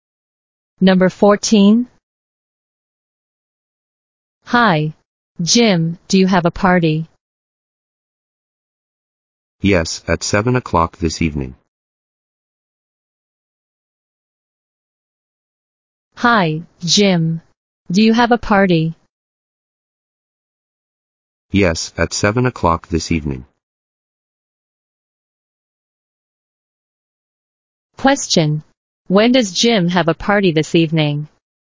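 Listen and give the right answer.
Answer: At 7 o'clock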